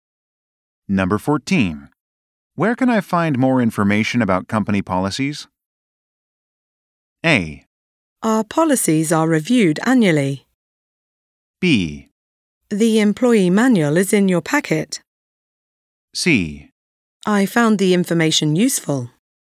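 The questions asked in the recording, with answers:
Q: Where can I find more information about company policies?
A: B: The employee manual is in your packet.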